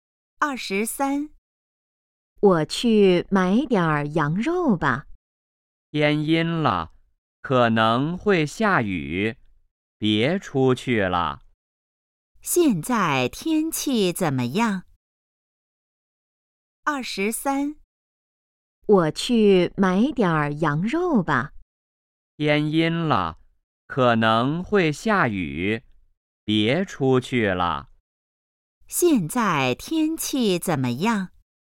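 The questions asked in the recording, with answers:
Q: 现在天气怎么样?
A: 天阴了,可能会下雨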